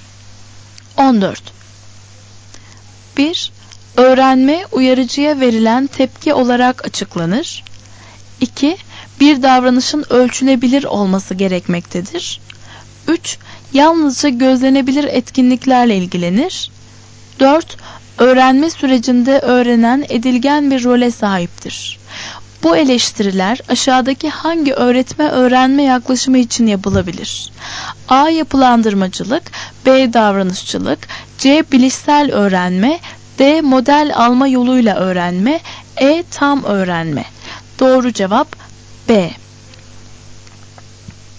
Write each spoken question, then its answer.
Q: Bu eleştiriler aşağıdaki hangi öğretme-öğrenme yaklaşımı için yapılabilir?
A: Doğru cevap B.